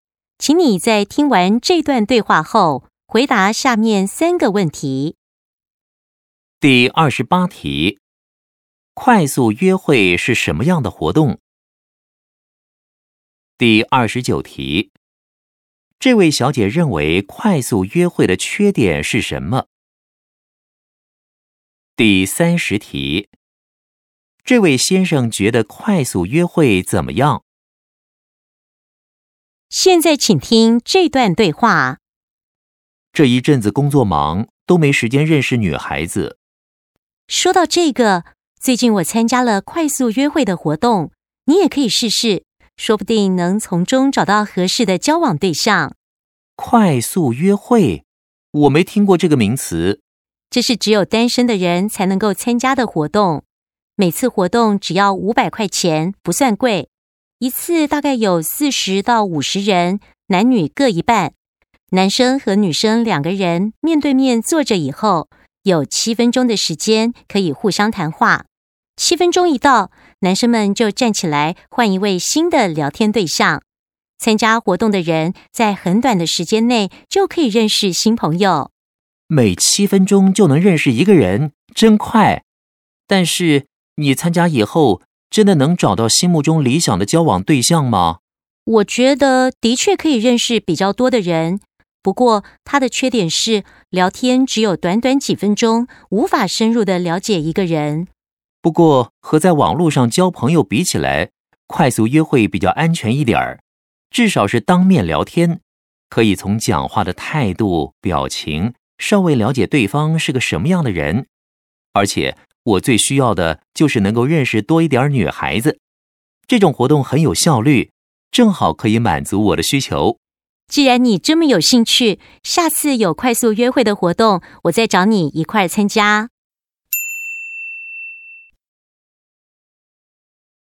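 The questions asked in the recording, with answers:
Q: 快速约会是什么样的活动?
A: 单身男女面对面聊天,每7分钟换一位对象,短时间内认识很多新朋友

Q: 这位小姐认为快速约会的缺点是什么?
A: 聊天只有短短几分钟,无法深入了解一个人

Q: 这位先生觉得快速约会怎么样?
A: 比网上交友安全,很有效率,能认识更多女孩子,他很感兴趣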